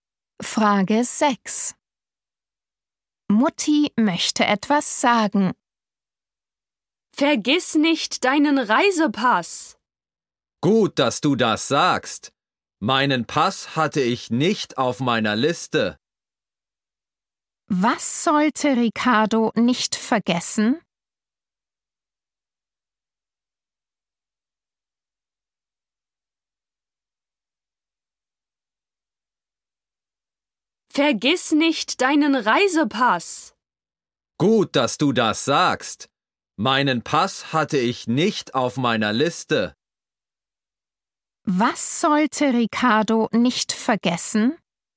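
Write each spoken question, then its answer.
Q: Was sollte Ricardo nicht vergessen?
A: seinen Reisepass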